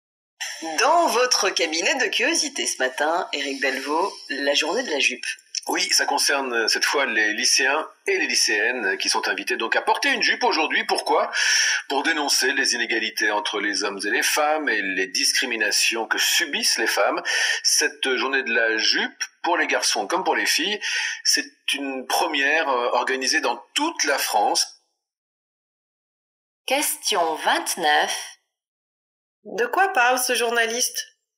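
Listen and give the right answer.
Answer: De la journée de la jupe, où les lycéens et lycéennes portent une jupe pour dénoncer les inégalités entre hommes et femmes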